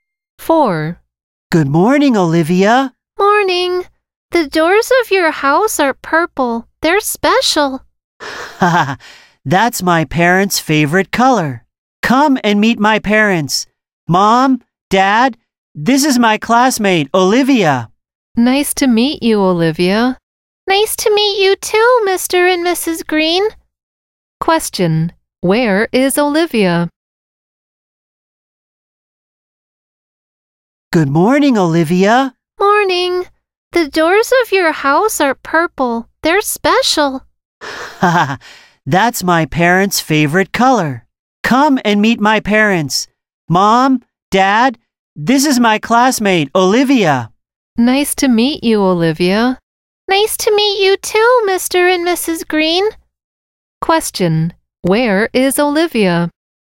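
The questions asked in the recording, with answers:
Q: where is Olivia?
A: At her classmate's house (the Greens' house)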